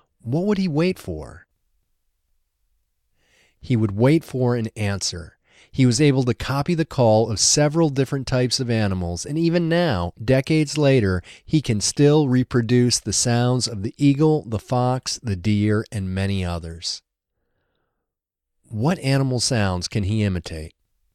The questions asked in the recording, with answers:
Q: What animal sounds can he imitate?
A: He can imitate the sounds of the eagle, the fox, the deer, and many others.